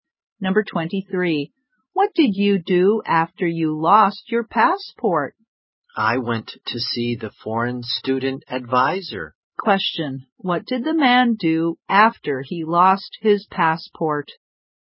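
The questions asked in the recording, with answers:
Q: What did the man do after he lost his passport?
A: He went to see the foreign student advisor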